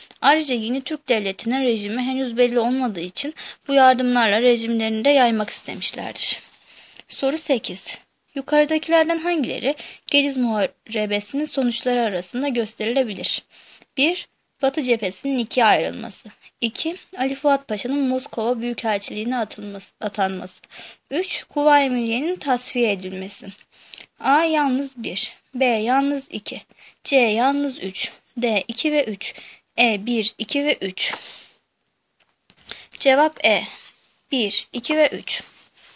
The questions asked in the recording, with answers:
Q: Yukarıdakilerden hangileri Gediz Muharebesi'nin sonuçları arasında gösterilebilir?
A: Cevap E. 1, 2 ve 3.